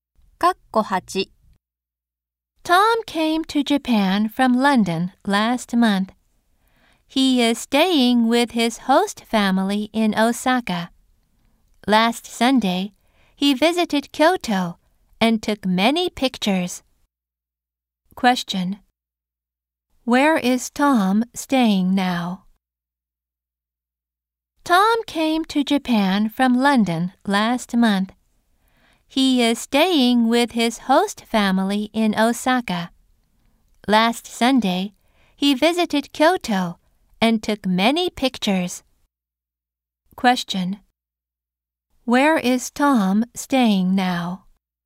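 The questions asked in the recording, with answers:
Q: Where is Tom staying now?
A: With his host family in Osaka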